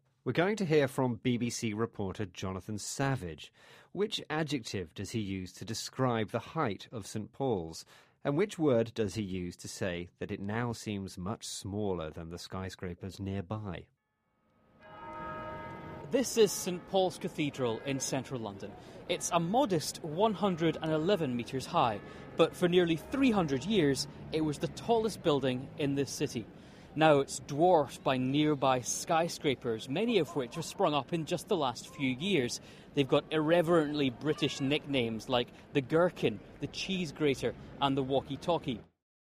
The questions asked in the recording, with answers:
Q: Which adjective does he use to describe the height of St.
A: He said it was a modest 111 metres high.

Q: And which word does he use to say that it now seems much smaller than the skyscrapers nearby?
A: And the other word we asked you to listen out for was dwarfed.